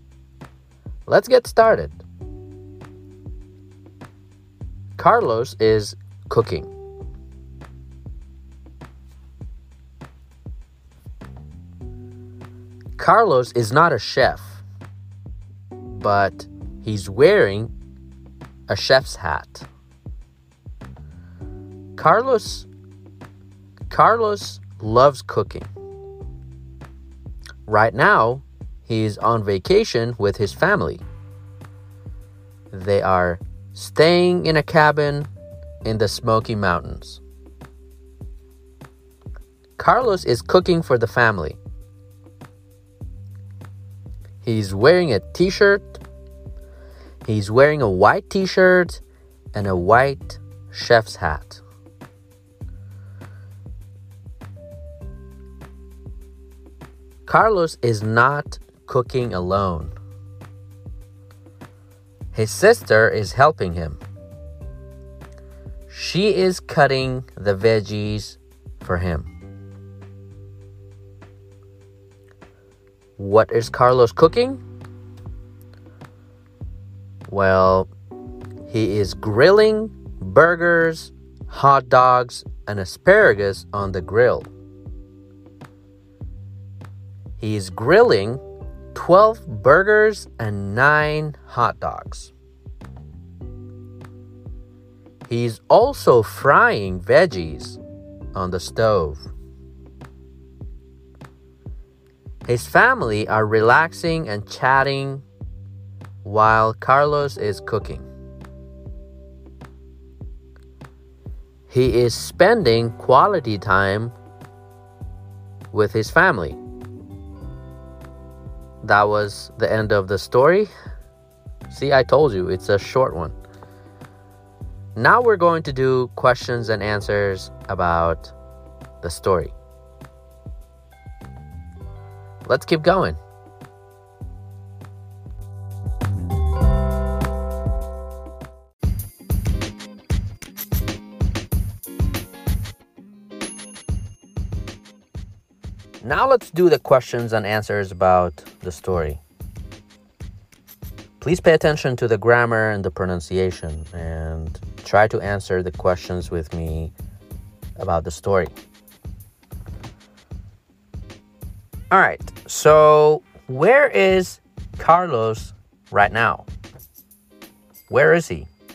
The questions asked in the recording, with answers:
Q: All right, so where is Carlos right now?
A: He is in the Smoky Mountains.